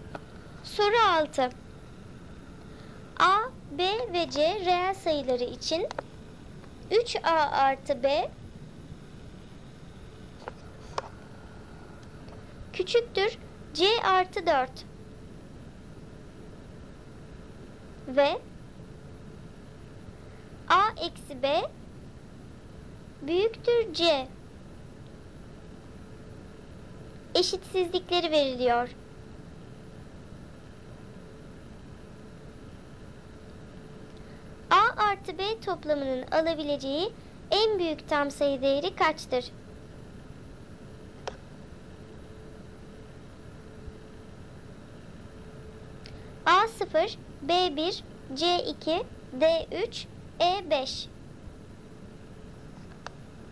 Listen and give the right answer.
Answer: Doğru cevap B 1.